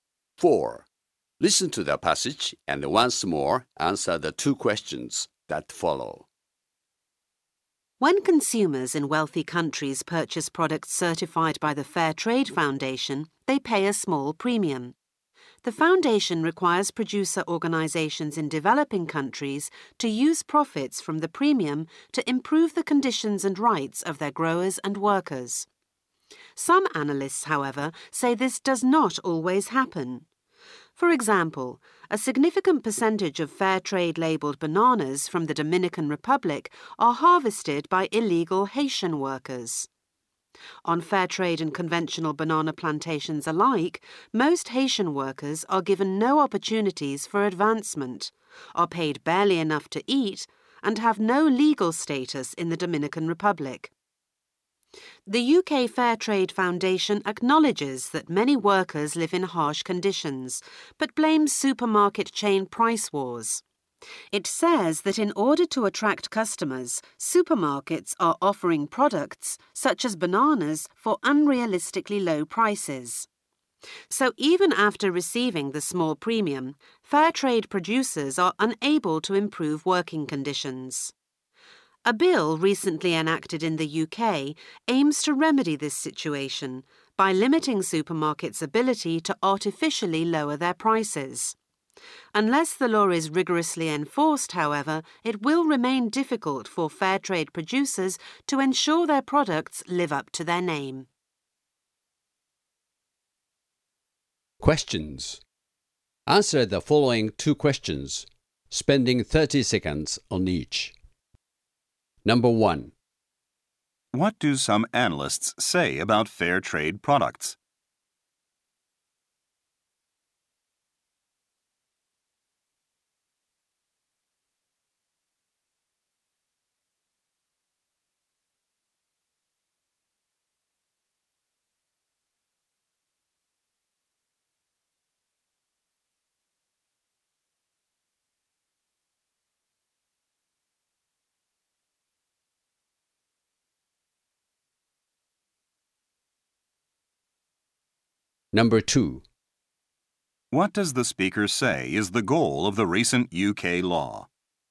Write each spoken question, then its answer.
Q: What do some analysts say about fair trade products?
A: Some analysts say that even though a premium is paid on fair trade items, the money sometimes fails to reach the actual workers.

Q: What does the speaker say is the goal of the recent UK law?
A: The recent legislation in the UK aims to make fair trade practices more effective by limiting supermarkets' ability to artificially lower prices.